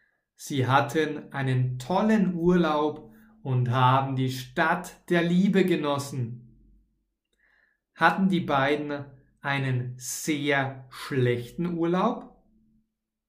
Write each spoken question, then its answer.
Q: Hatten die beiden einen sehr schlechten Urlaub?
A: Nein, die beiden hatten keinen sehr schlechten Urlaub, sondern die beiden hatten einen tollen Urlaub.